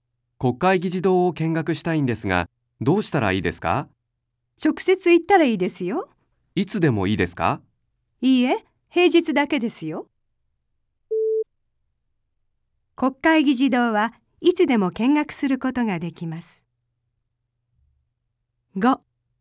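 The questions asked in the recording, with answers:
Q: 国会議事堂はいつでも見学することができます。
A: 正しくない(×):平日だけ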